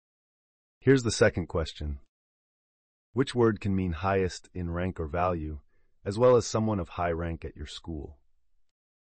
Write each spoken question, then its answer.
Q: Which word can mean highest in rank or value, as well as someone of high rank at your school?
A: The answer is principal.